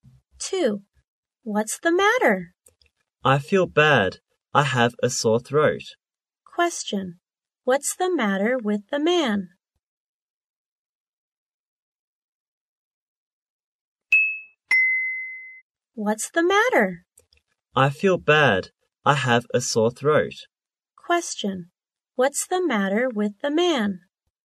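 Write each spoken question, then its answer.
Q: What's the matter with the man?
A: He has a sore throat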